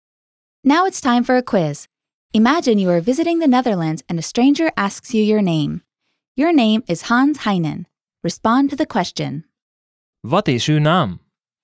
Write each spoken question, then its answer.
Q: Wat is uw naam?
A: Mijn naam is Hans Heinen.